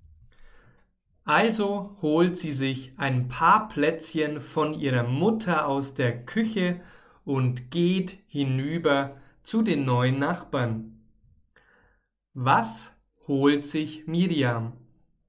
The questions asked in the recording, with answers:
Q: Was holt sich Miriam?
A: Sie holt sich ein paar Plätzchen.